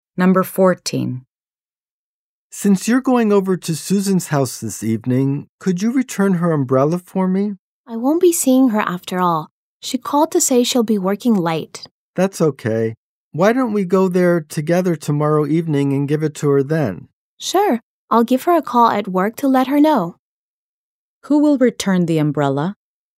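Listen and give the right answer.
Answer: Both speakers together, tomorrow evening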